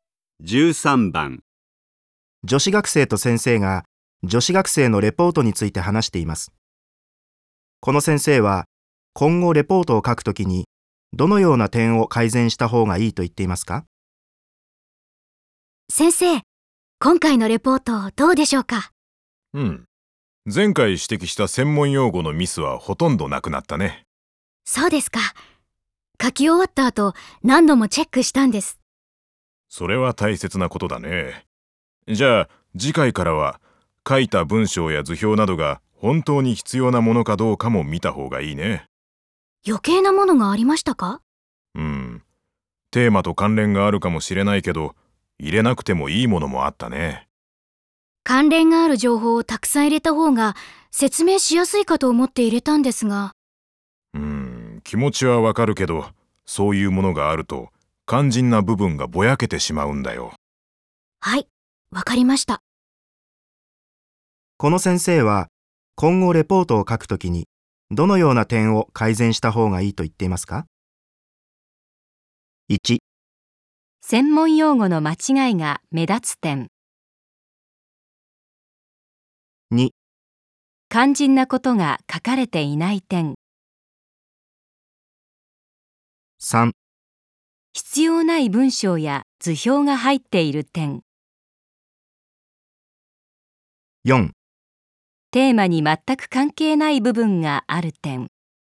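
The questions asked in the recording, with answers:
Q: この先生は今後レポートを書くときにどのような点を改善した方がいいと言っていますか?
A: 3: 必要ない文章や図表が入っている点。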